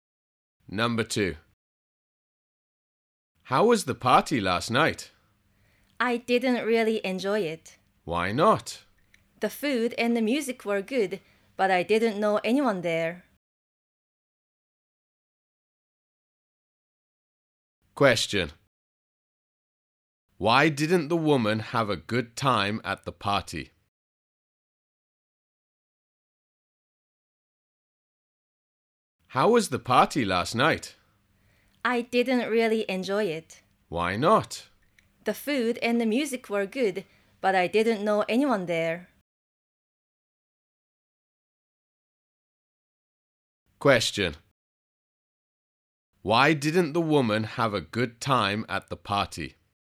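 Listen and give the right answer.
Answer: She didn't know anyone there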